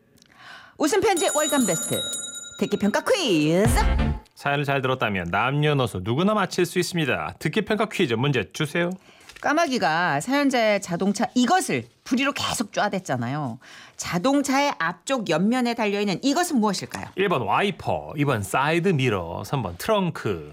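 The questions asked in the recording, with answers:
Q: 까마귀가 사연자의 자동차 이것을 부리로 계속 쪼아댔잖아요. 자동차의 앞쪽 옆면에 달려있는 이것은 무엇일까요?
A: 2: 사이드 미러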